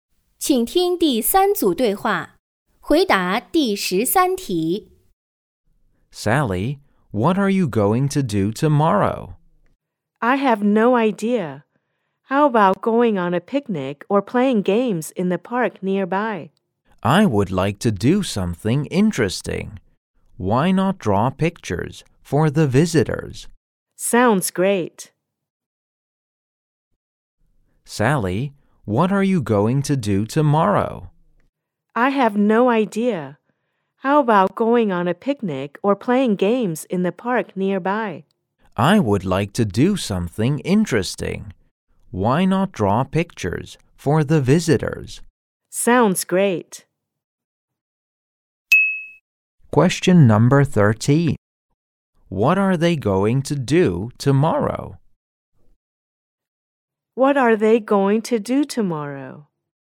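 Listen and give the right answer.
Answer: Draw pictures for the visitors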